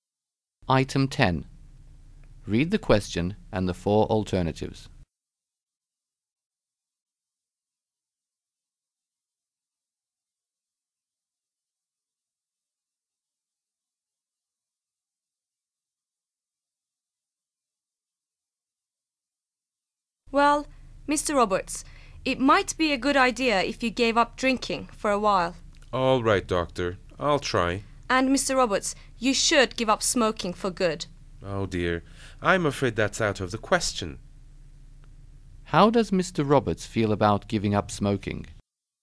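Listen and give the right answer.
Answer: He refuses; it's out of the question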